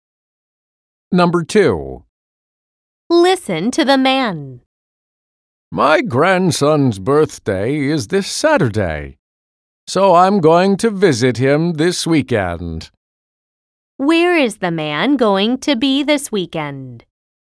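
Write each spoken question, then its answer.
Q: Where is the man going to be this weekend?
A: At his grandson's (visiting his grandson for his birthday)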